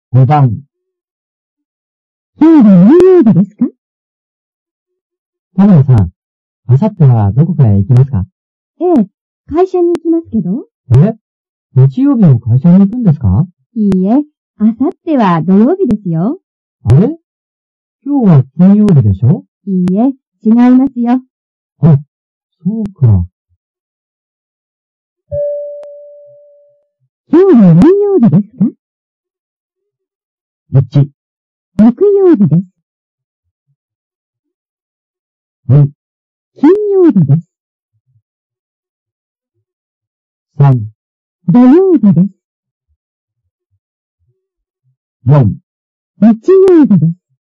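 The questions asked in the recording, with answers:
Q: 今日は何曜日ですか?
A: 1: 木曜日です。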